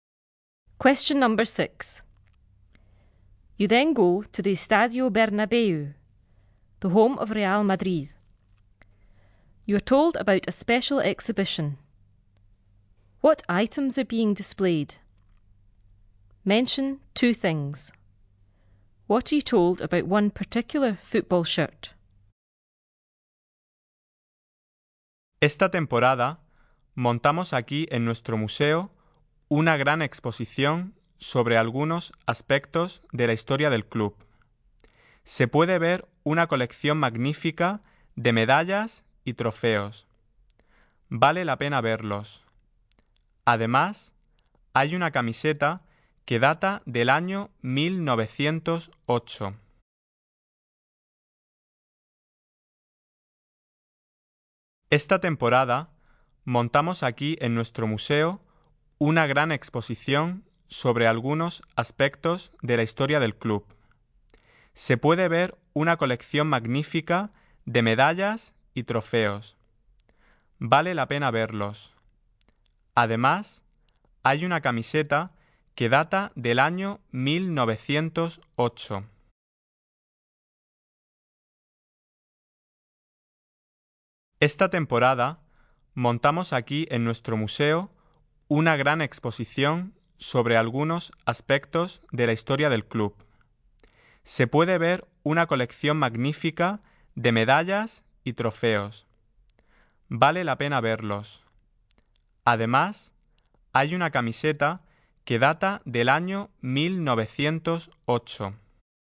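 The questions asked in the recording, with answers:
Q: What items are being displayed?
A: Medals and trophies

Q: What are you told about one particular football shirt?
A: It dates from 1908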